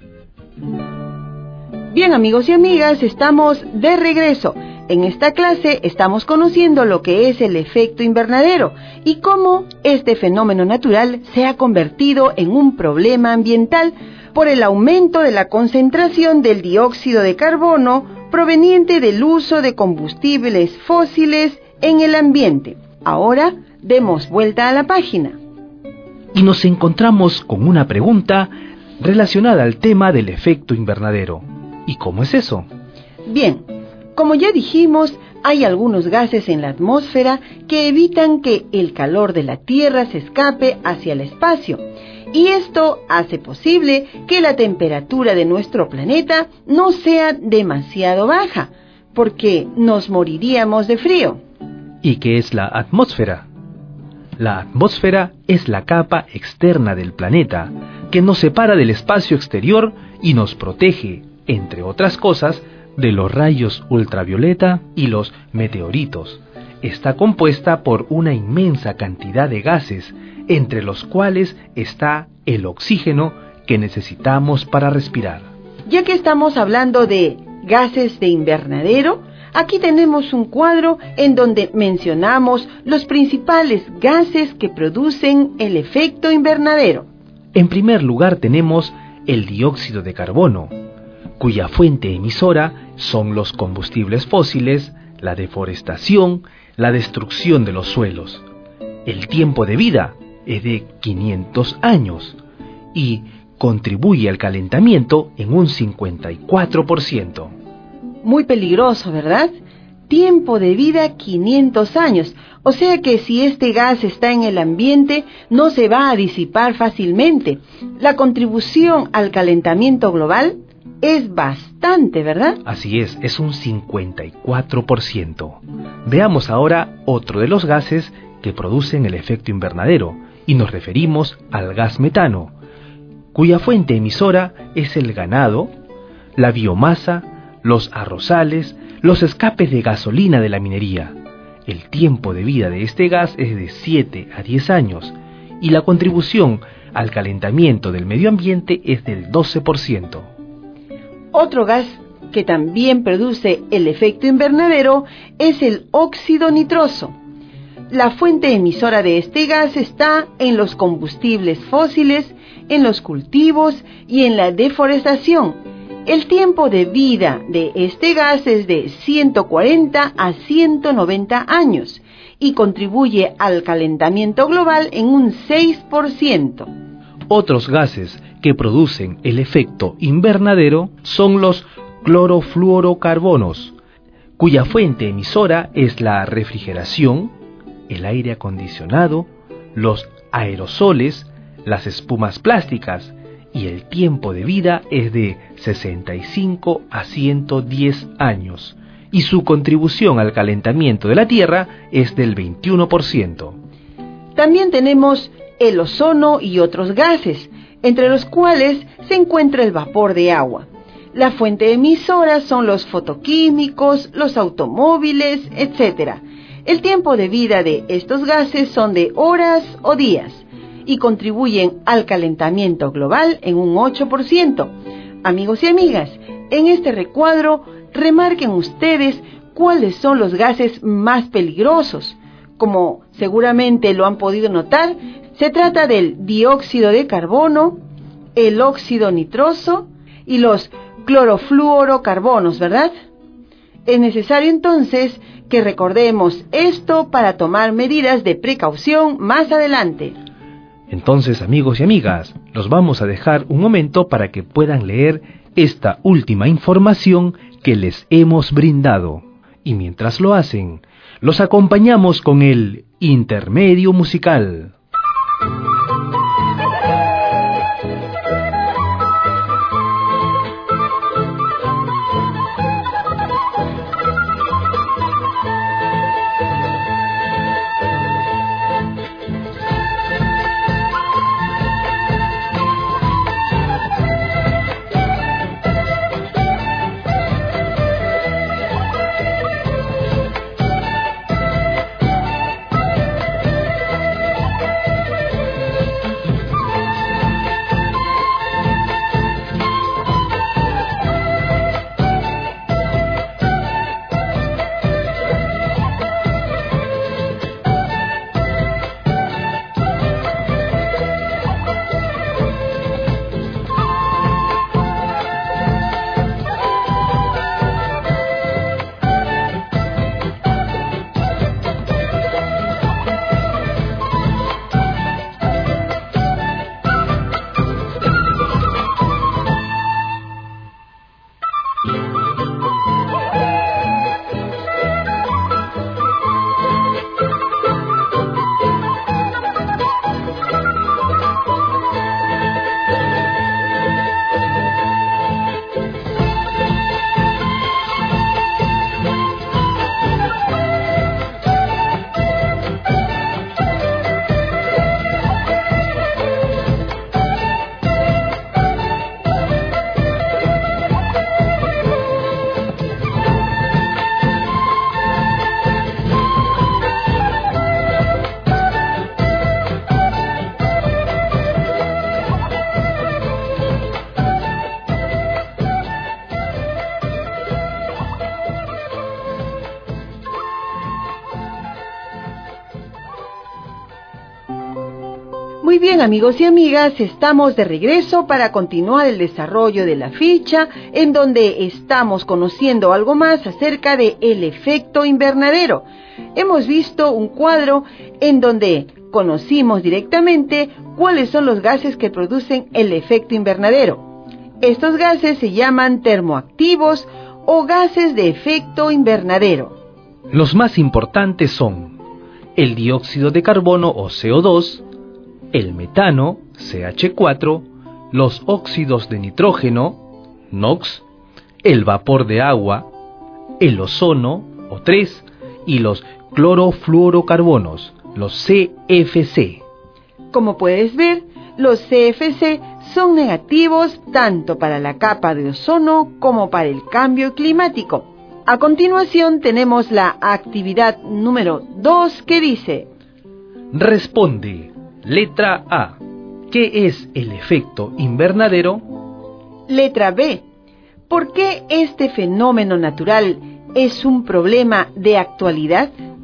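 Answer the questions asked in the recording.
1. Un fenómeno atmosférico natural en el que los gases de la atmósfera retienen parte del calor del sol y mantienen la temperatura del planeta.
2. Porque la mayor concentración de dióxido de carbono por el uso de combustibles fósiles lo ha intensificado y eleva la temperatura global.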